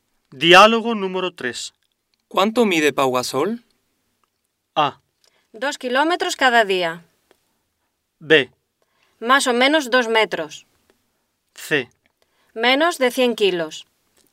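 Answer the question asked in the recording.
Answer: B: Más o menos 2 metros.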